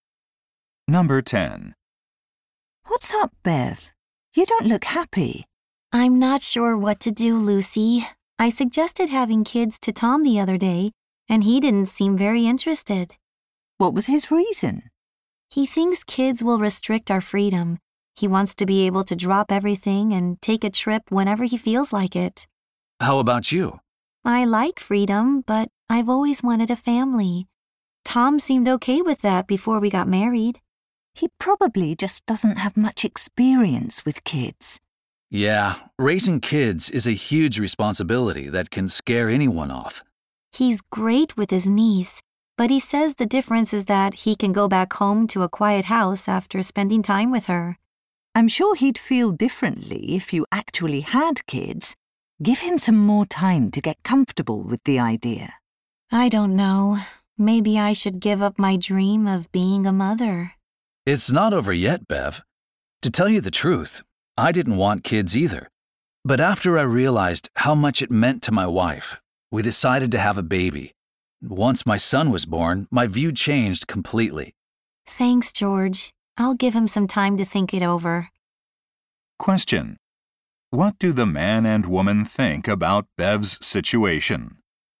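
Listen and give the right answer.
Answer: They think Tom may change his mind and that Bev should give him more time.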